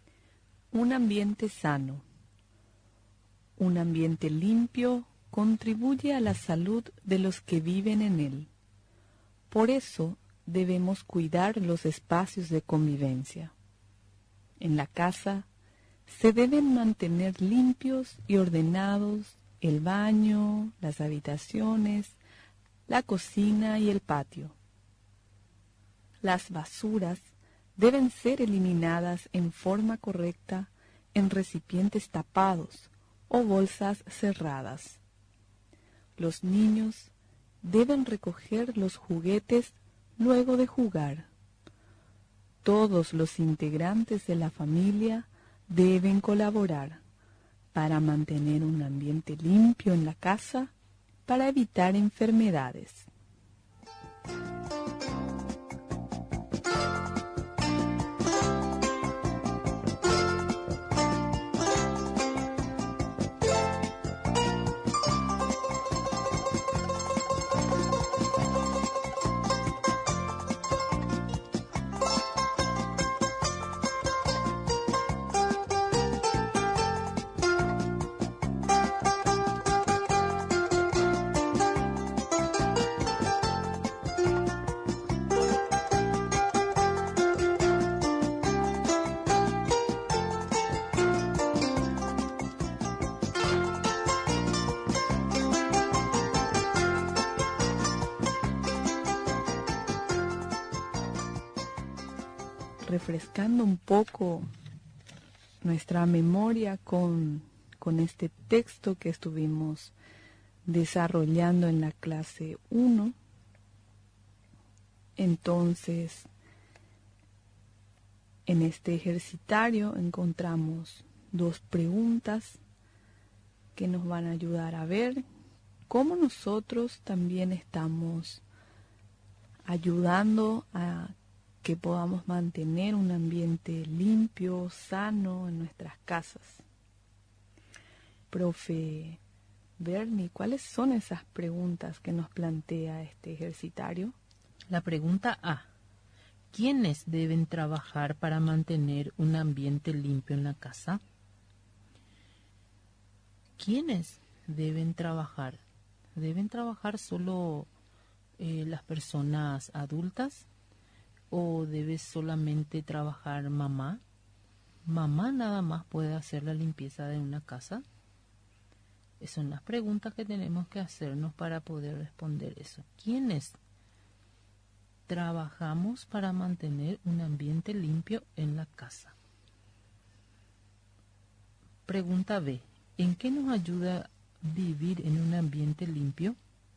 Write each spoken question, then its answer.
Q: ¿En qué nos ayuda vivir en un ambiente limpio?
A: el ambiente limpio nos ayuda para prevenirnos.